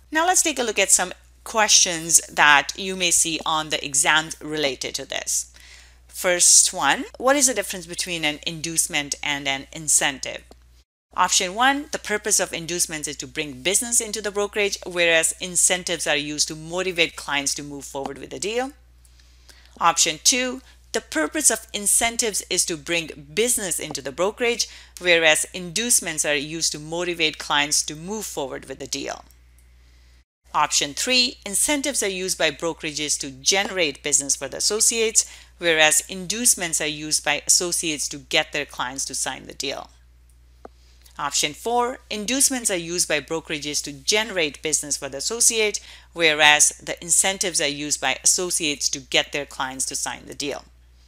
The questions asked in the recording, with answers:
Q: First one, what is the difference between an inducement and an incentive?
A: So in this case, the correct answer is B.